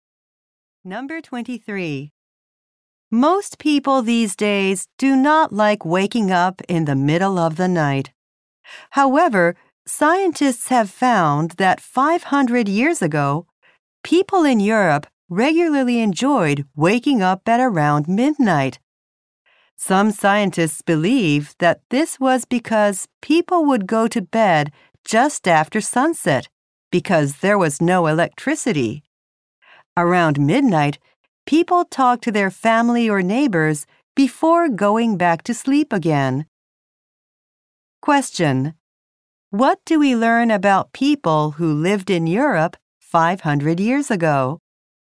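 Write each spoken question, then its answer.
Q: what do we learn about people who lived in Europe 500 years ago?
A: They enjoyed waking up around midnight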